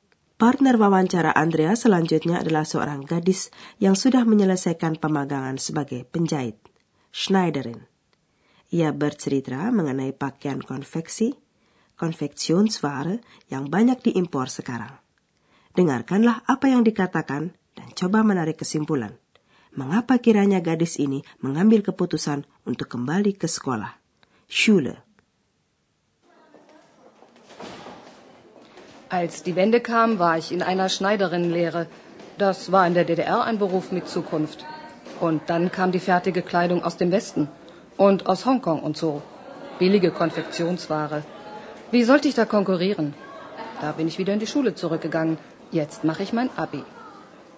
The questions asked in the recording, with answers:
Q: Mengapa kiranya gadis ini mengambil keputusan untuk kembali ke sekolah?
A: Menurut pertimbangannya, tidak ada peluang baginya kalau harus bersaing dengan pakaian jadi yang murah itu.